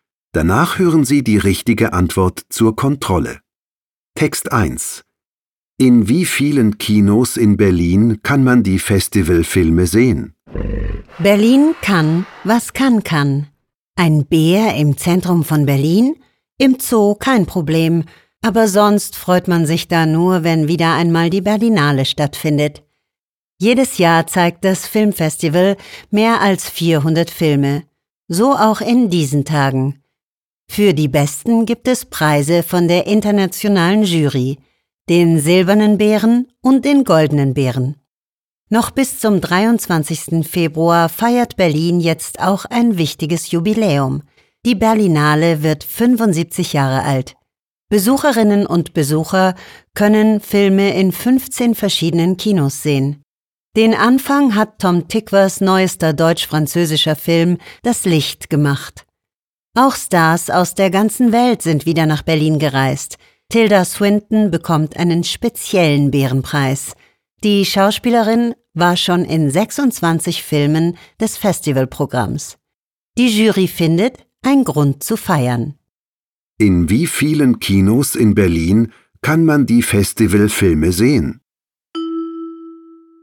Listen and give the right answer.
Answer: Besucherinnen und Besucher der Berlinale können Filme in 15 verschiedenen Kinos sehen.